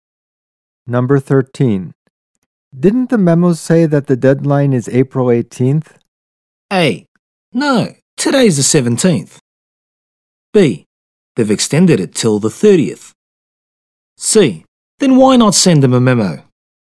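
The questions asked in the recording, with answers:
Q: Didn't the memo say that the deadline is April 18th?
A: B: They've extended it till the 30th.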